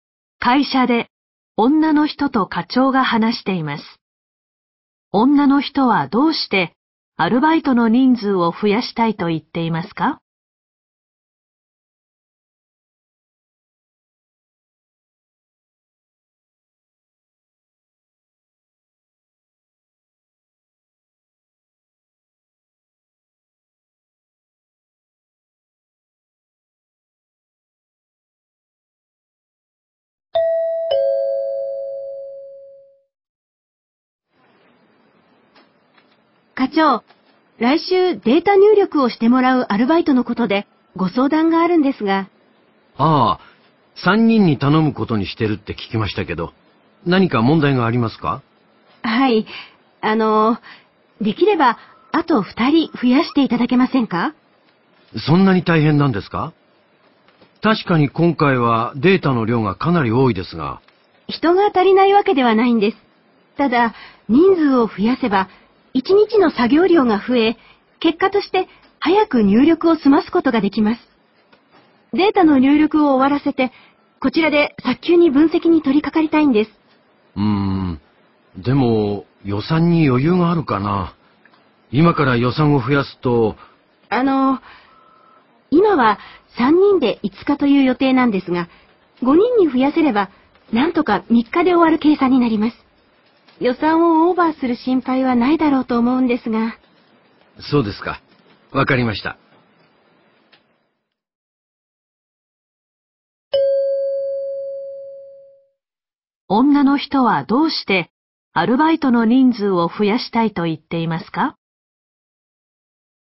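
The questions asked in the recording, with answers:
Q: 女の人はどうしてアルバイトの人数を増やしたいと言っていますか?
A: データ入力を早く終わらせて、早急に分析に取り掛かりたいから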